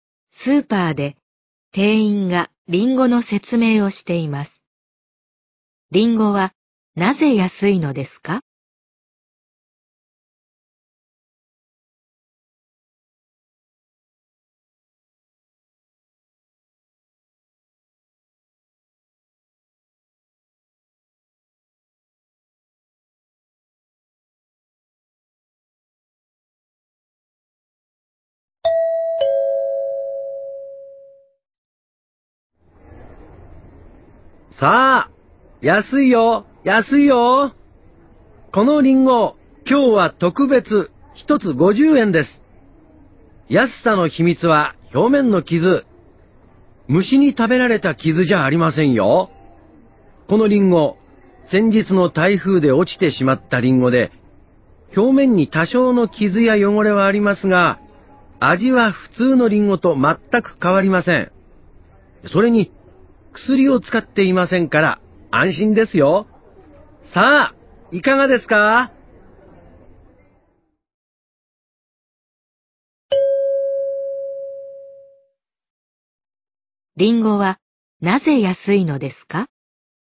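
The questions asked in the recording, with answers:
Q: リンゴはなぜ安いのですか?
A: 台風で落ちて表面に傷や汚れがあるから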